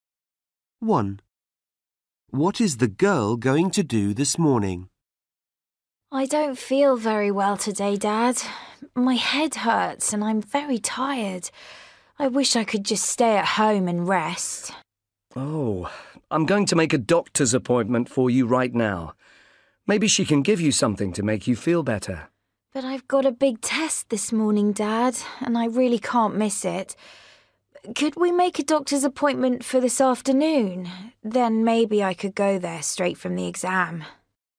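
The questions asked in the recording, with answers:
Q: What is the girl going to do this morning?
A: Go to school and take a big test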